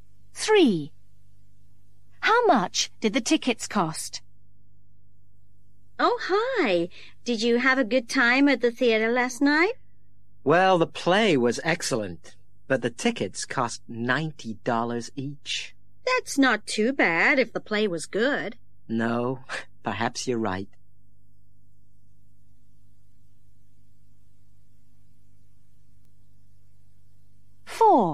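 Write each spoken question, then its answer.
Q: How much did the tickets cost?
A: $90 each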